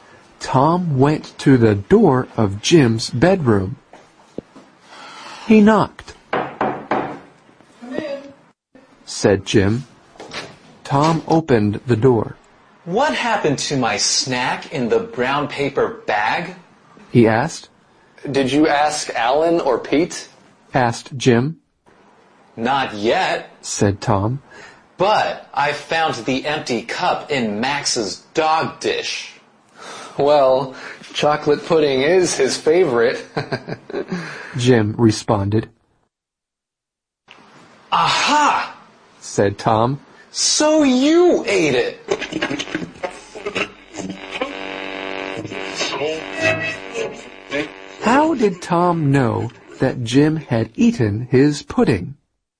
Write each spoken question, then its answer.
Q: How did Tom know that Jim had eaten his pudding?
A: If Jim saw it, that's because he took it out of the bag.